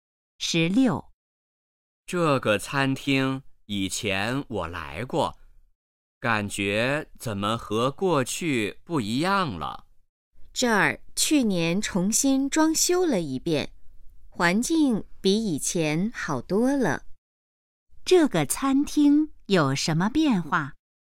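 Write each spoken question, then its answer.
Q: 这个餐厅有什么变化?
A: 重新装修了,环境比以前好多了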